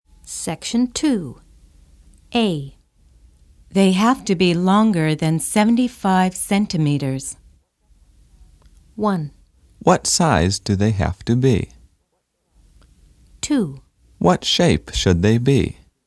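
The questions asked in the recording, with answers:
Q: They have to be longer than 75 centimeters.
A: 1: What size do they have to be?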